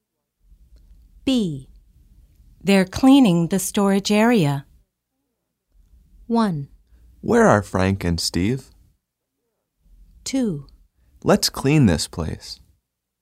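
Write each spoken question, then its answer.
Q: They're cleaning the storage area.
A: 1: Where are Frank and Steve?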